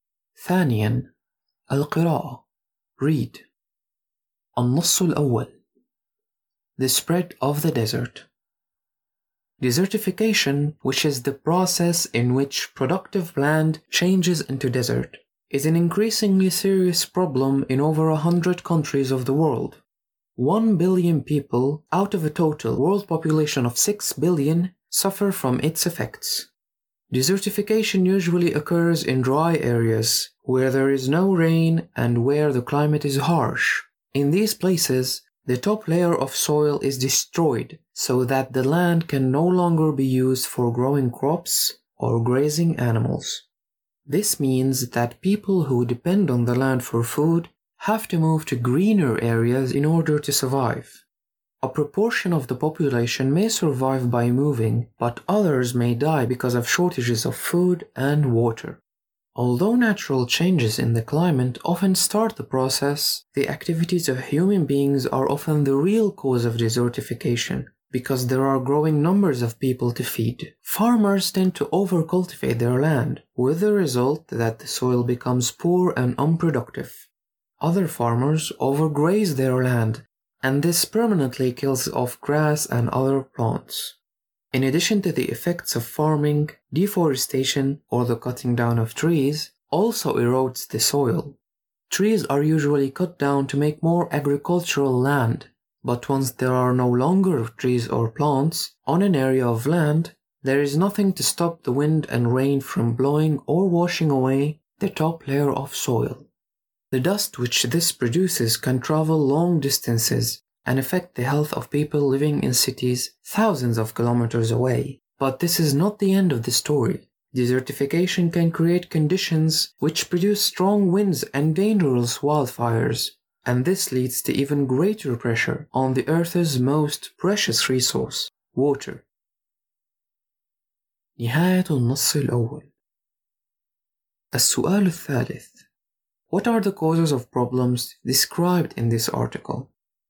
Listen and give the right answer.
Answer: No rain, harsh climate, top layer of the soil destroyed, overcultivation and overgrazing, and finally deforestation.